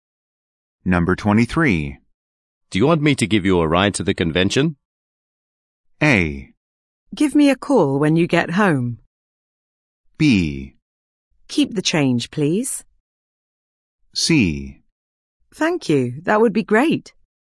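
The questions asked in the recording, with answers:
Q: Do you want me to give you a ride to the convention?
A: C: Thank you. That would be great.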